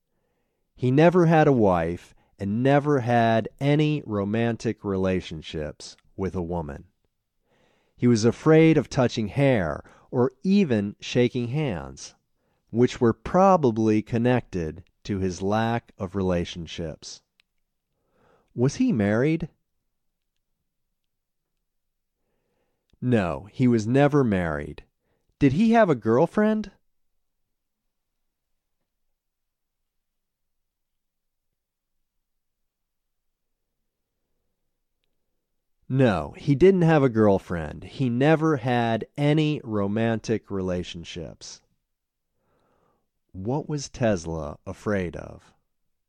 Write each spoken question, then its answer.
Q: What was Tesla afraid of?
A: He was afraid of touching hair or shaking hands.